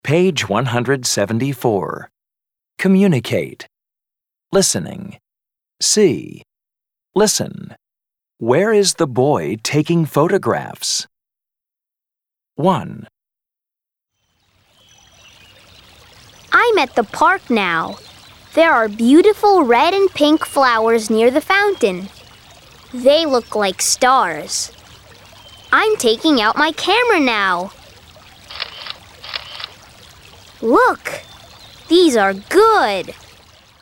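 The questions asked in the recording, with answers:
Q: Where is the boy taking photographs?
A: At the park, near the fountain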